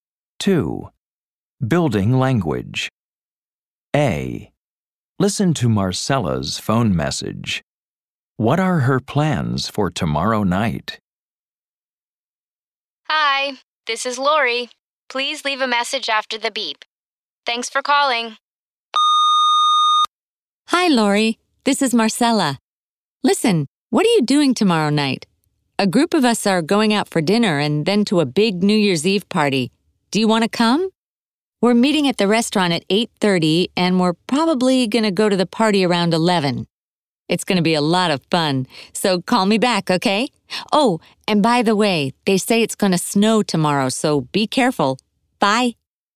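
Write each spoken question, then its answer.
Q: What are her plans for tomorrow night?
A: Going out for dinner with a group, then to a big New Year's Eve party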